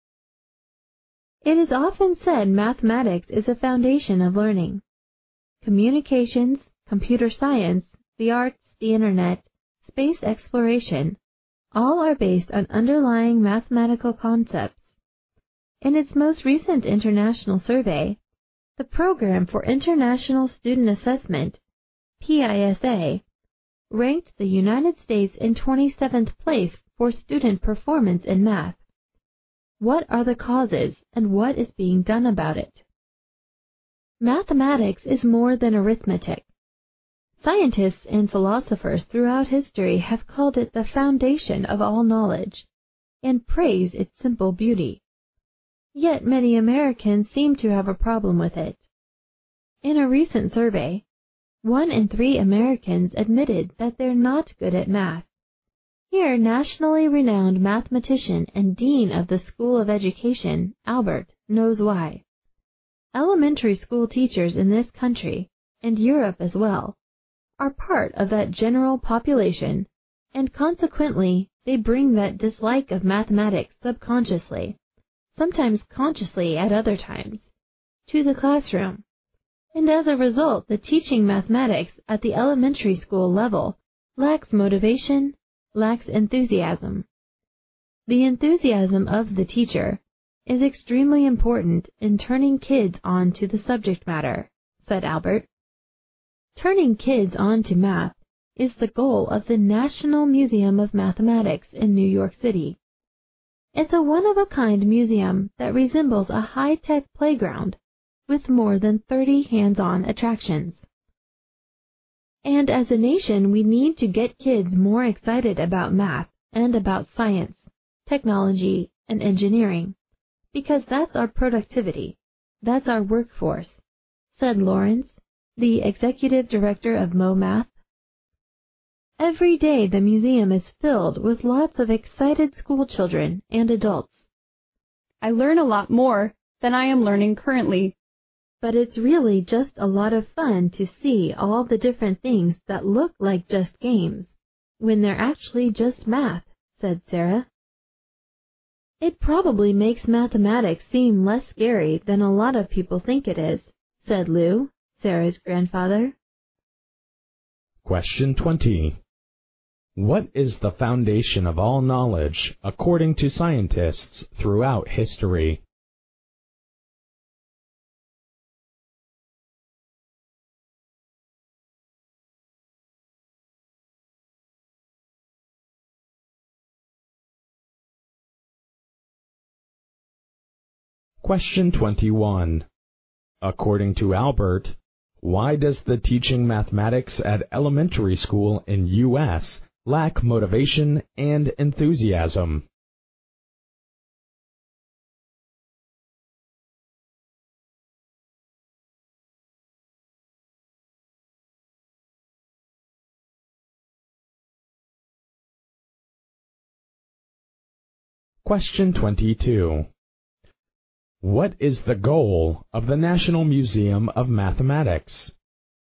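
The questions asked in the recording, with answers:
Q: What is the foundation of all knowledge, according to scientists throughout history?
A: Mathematics

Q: According to Albert, why does the teaching mathematics at elementary school in U.S. lack motivation and enthusiasm?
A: Because elementary school teachers share the general population's dislike of mathematics and bring it to the classroom

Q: What is the goal of the National Museum of Mathematics?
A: Turning kids on to math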